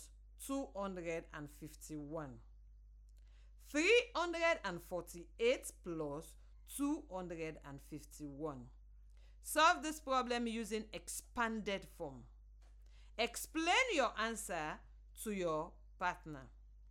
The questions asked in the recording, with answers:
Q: 348 + 251. Solve this problem using expanded form.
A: 500 + 90 + 9, which equals 599.